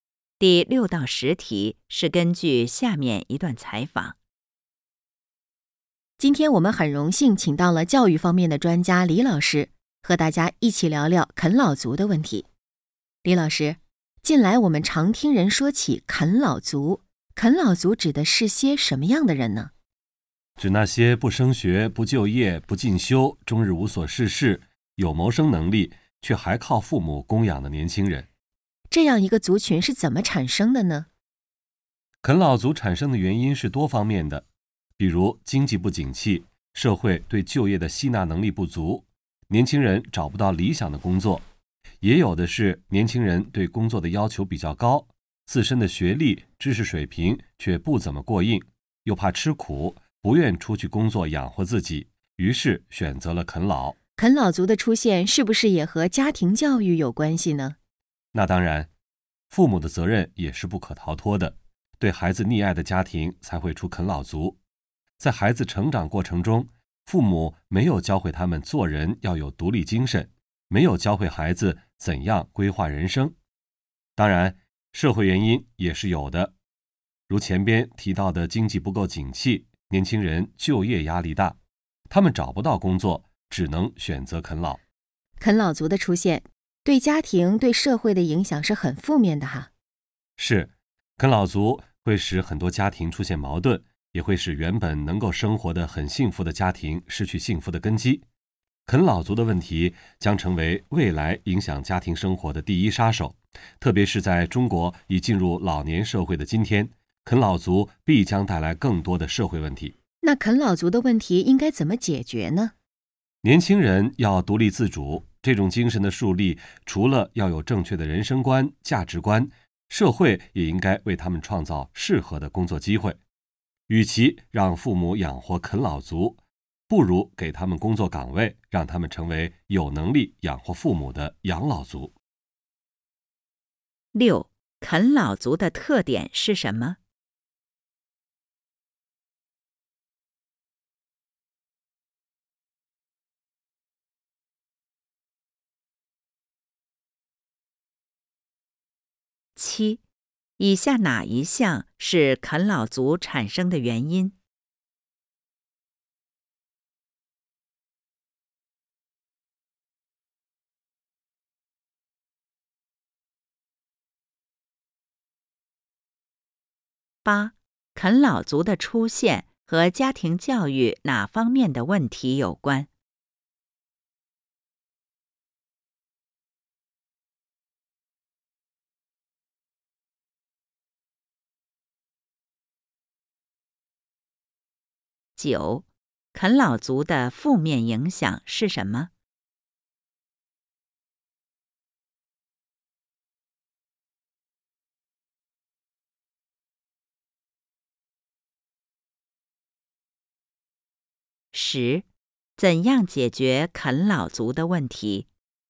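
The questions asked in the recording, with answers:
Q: 啃老族的特点是什么?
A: 有谋生能力却不就业,靠父母供养

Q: 啃老族的出现和家庭教育哪方面的问题有关?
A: 父母溺爱,没教会孩子独立和规划人生

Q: 啃老族的负面影响是什么?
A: 使家庭出现矛盾、失去幸福,带来社会问题

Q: 怎样解决啃老族的问题?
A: 年轻人独立自主,社会提供工作机会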